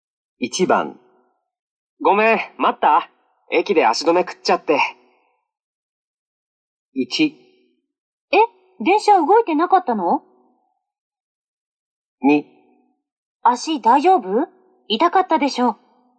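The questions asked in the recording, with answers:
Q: ごめん、待った駅で足止め食っちゃって。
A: 1: 電車動いてなかったの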